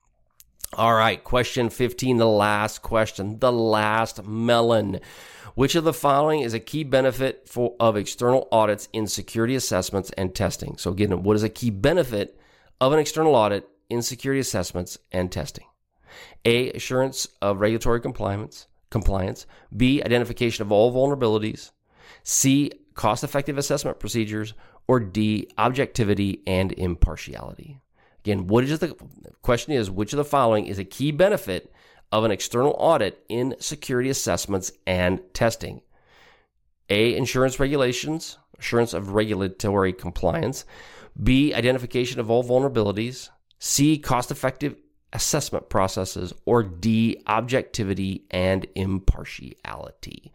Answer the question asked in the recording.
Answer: And the answer would be D, objectivity and impartiality are one of the key benefits of having an external audit.